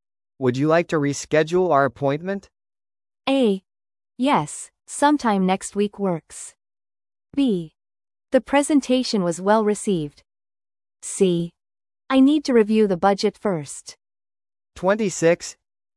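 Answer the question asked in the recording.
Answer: A: Yes, sometime next week works.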